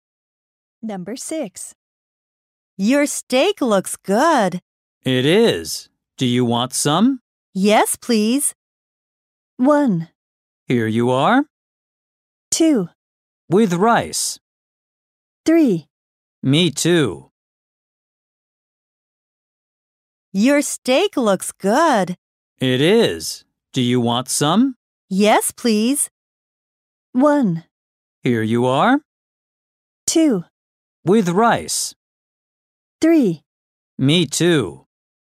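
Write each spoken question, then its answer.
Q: Yes, please.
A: 1: Here you are.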